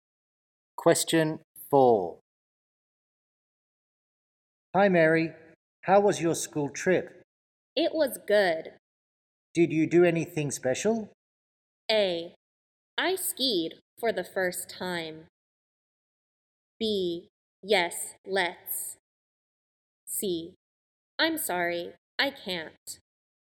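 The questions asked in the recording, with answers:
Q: Did you do anything special?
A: A: I skied for the first time.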